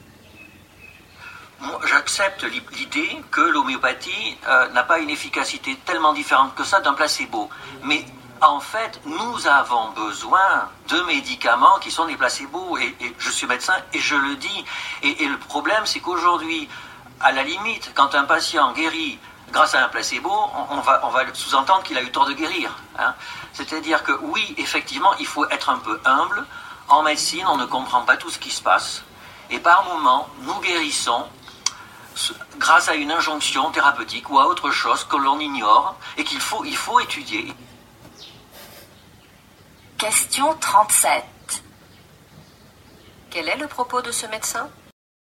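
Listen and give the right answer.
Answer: Les placebos comme l'homéopathie peuvent être utiles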